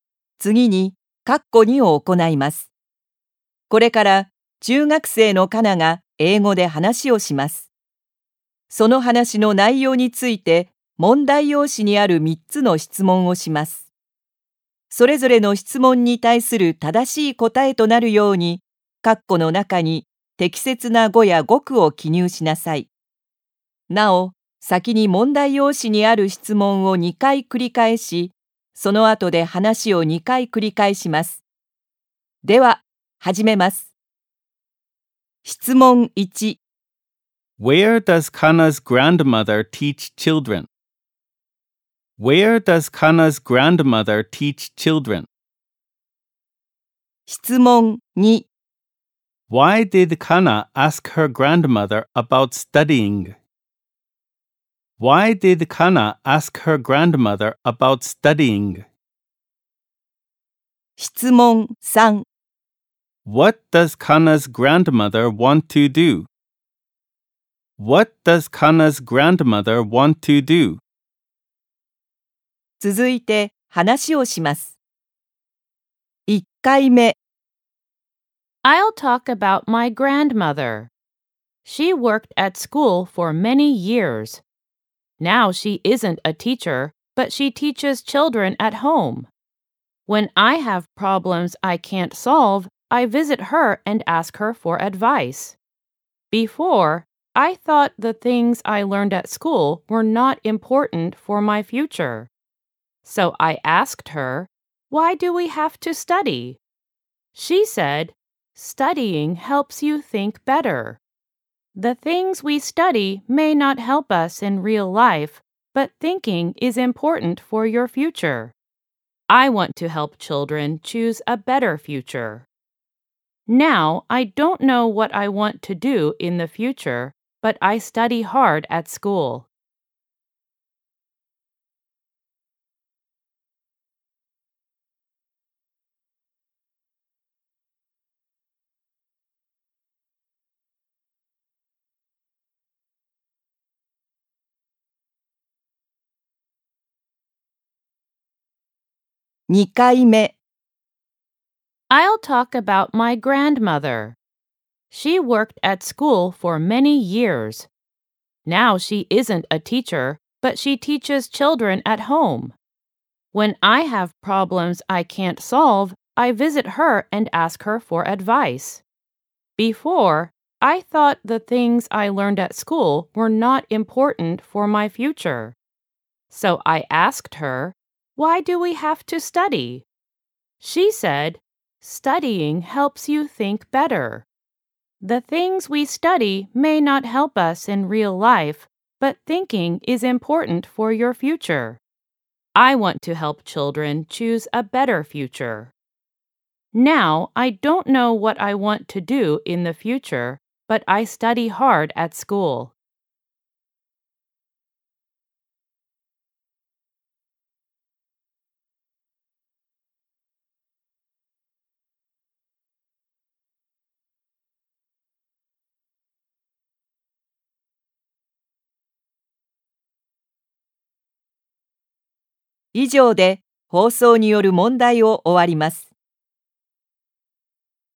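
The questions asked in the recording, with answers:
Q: Where does Kana's grandmother teach children?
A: At home.

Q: Why did Kana ask her grandmother about studying?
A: Because she thought the things she learned at school were not important for her future.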